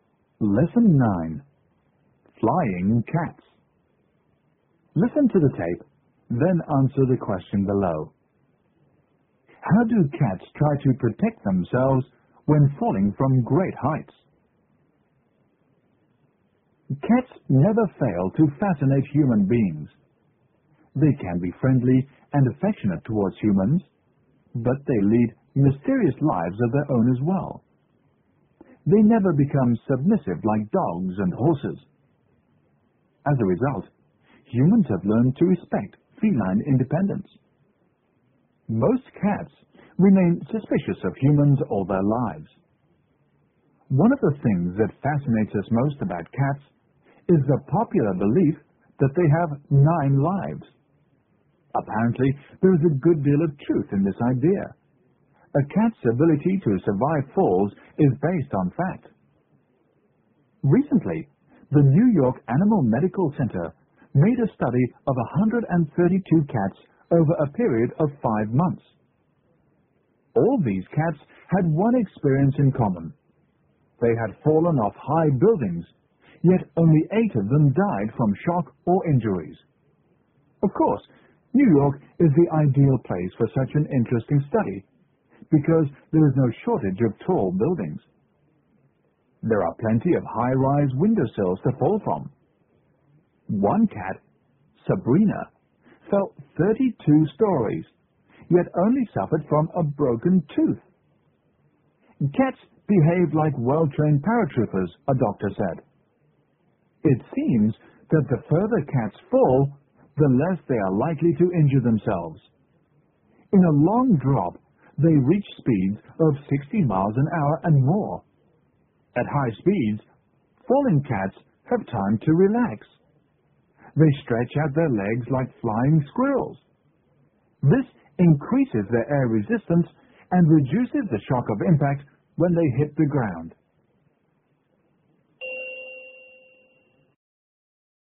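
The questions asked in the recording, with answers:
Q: How do cats try to protect themselves when falling from great heights?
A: They relax and stretch out their legs like flying squirrels, which increases air resistance and reduces the shock of impact.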